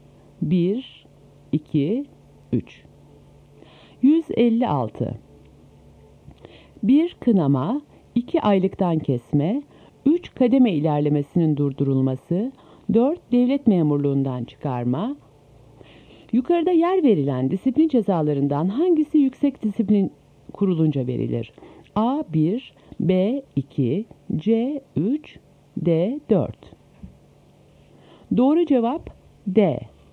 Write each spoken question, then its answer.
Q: Yukarıda yer verilen disiplin cezalarından hangisi yüksek disiplin kurulunca verilir?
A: Doğru cevap D.